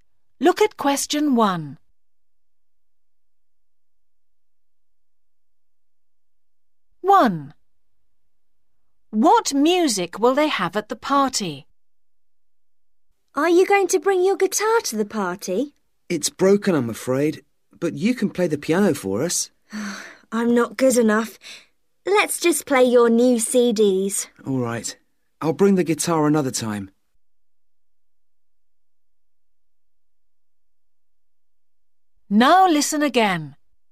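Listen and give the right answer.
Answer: CDs (the new CDs)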